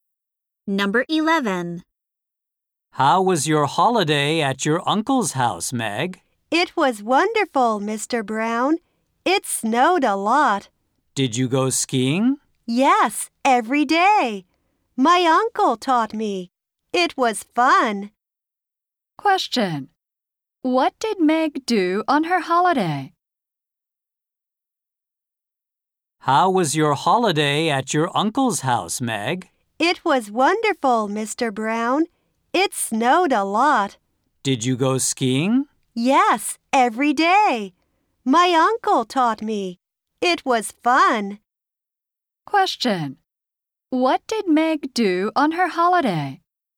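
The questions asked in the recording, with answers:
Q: What did Meg do on her holiday?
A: She went skiing every day.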